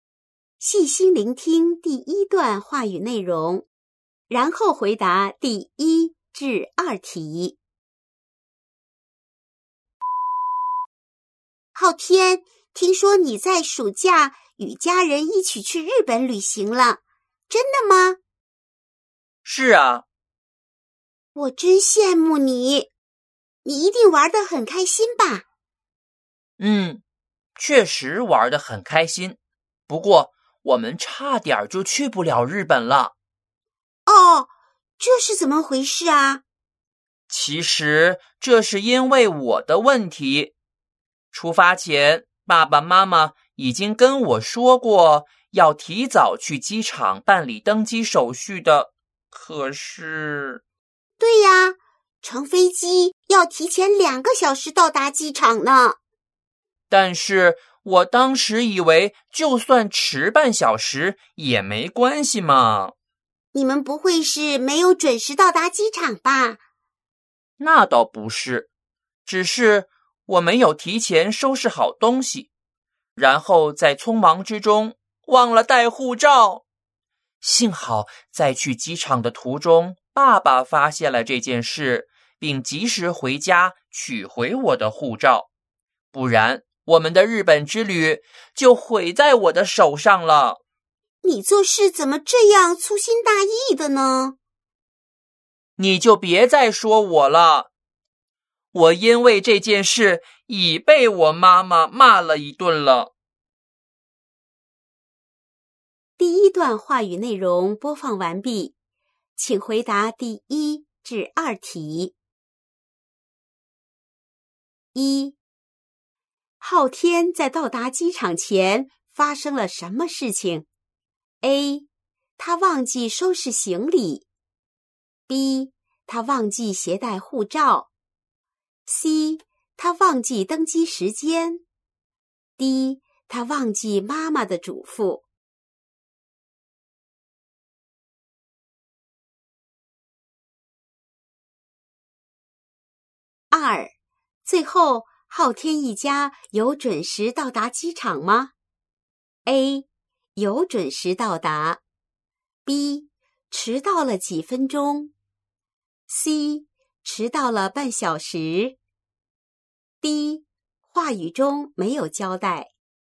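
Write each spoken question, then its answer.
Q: 昊天在到达机场前发生了什么事情?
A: B: 他忘记携带护照。

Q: 最后昊天一家有准时到达机场吗?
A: A: 有准时到达。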